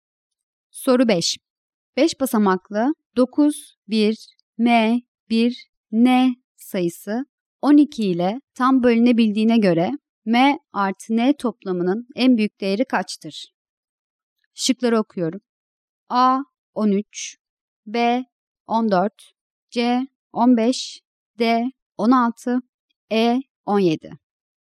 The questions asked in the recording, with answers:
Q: 5 basamaklı 9, 1, M, 1, N sayısı 12 ile tam bölünebildiğine göre M artı N toplamının en büyük değeri kaçtır?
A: Doğru cevap A şıkkı.